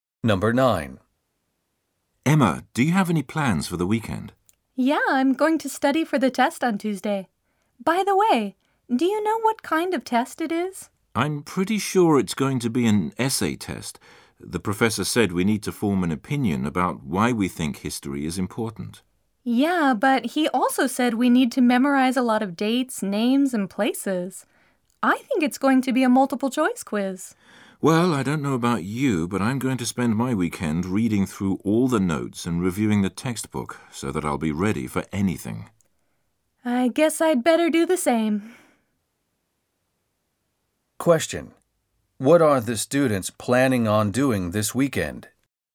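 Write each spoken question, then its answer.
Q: What are the students planning on doing this weekend?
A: Studying for the history test on Tuesday by reviewing notes and the textbook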